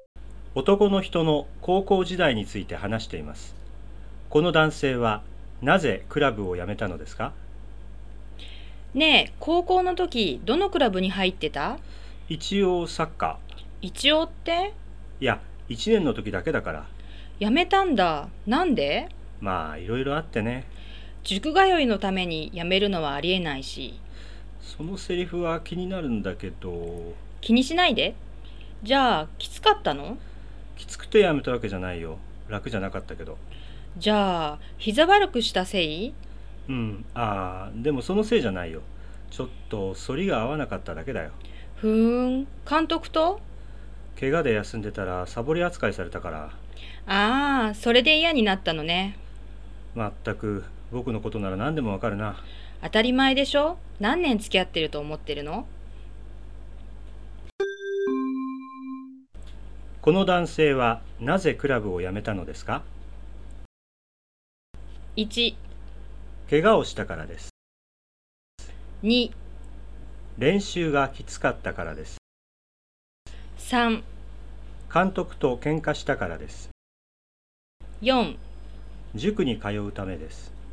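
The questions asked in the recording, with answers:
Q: この男性はなぜクラブを辞めたのですか?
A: 3: 監督と喧嘩したからです。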